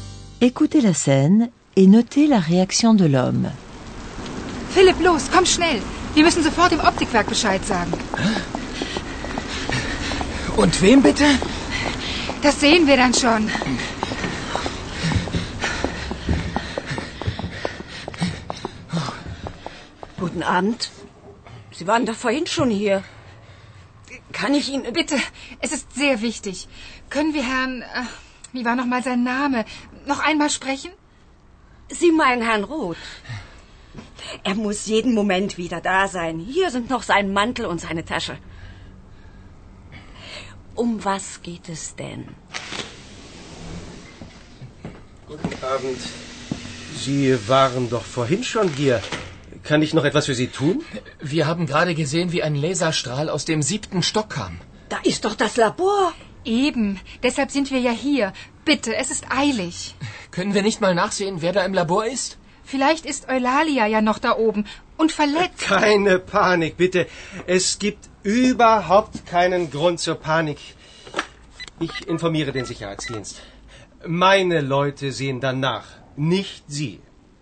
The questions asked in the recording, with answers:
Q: Écoutez la scène et notez la réaction de l'homme.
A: Le porte-parole réagit calmement, ou du moins il fait comme si.